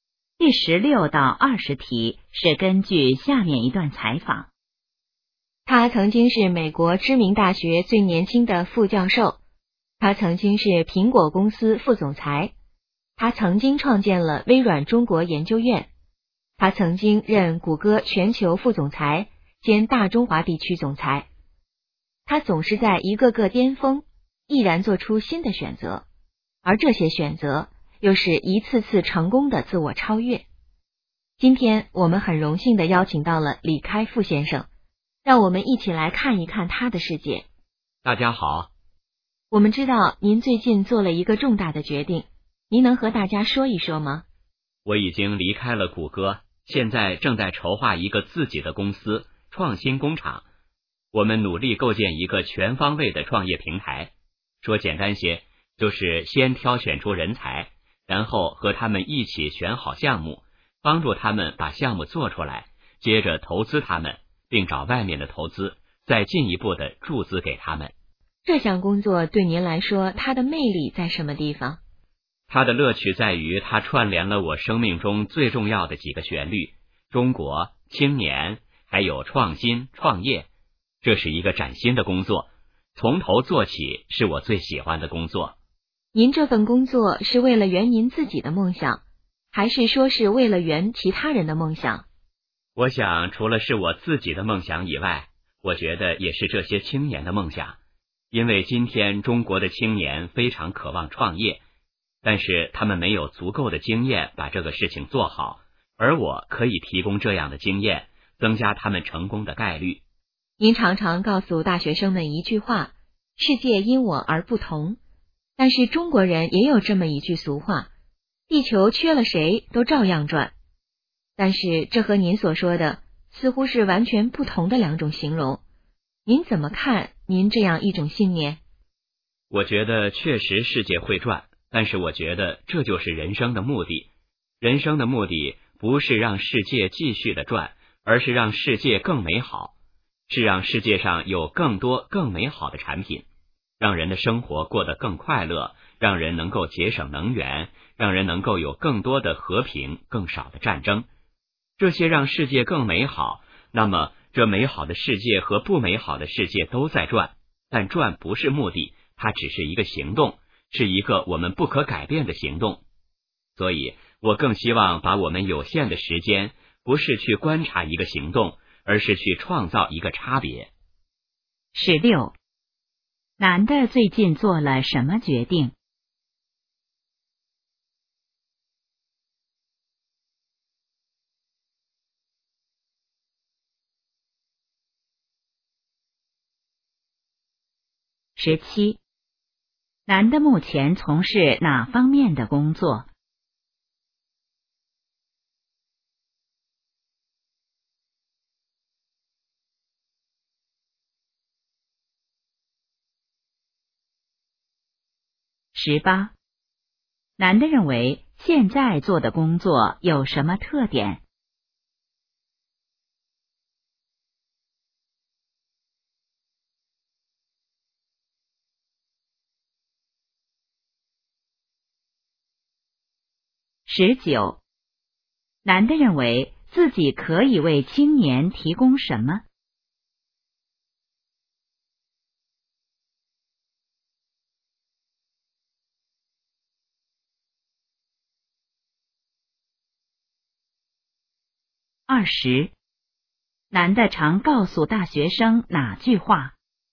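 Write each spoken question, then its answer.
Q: 男的最近做了什么决定?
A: 离开谷歌,筹划自己的公司创新工厂

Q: 男的目前从事哪方面的工作?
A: 构建创业平台,帮助青年创业并投资

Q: 男的认为现在做的工作有什么特点?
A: 是崭新的工作,从头做起

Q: 男的认为自己可以为青年提供什么?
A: 创业经验

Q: 男的常告诉大学生哪句话?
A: 世界因我而不同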